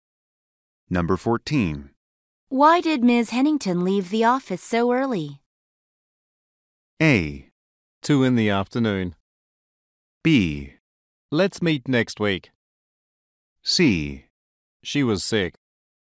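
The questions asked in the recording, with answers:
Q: Why did Ms. Hennington leave the office so early?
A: C: She was sick.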